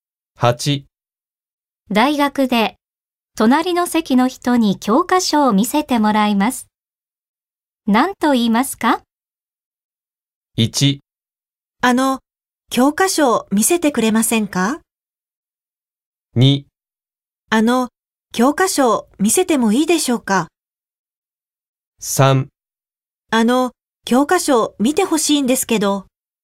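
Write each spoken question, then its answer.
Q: 大学で隣の席の人に教科書を見せてもらいます。何と言いますか?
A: 1: 教科書を見せてくれませんか?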